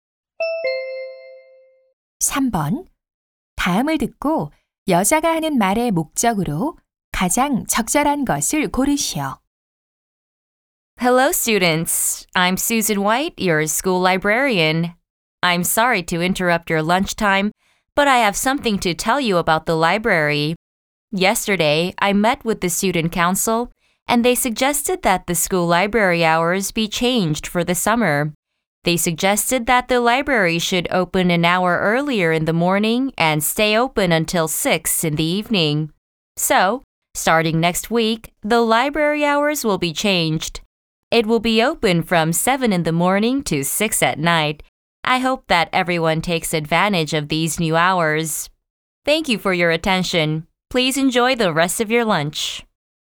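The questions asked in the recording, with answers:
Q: 다음을 듣고 여자가 하는 말의 목적으로 가장 적절한 것을 고르시오.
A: 도서관 운영 시간 변경을 안내하려고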